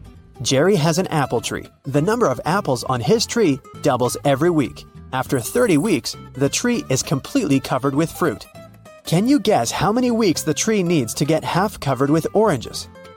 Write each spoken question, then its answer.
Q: Can you guess how many weeks the tree needs to get half covered with oranges?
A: Oranges don't grow on apple trees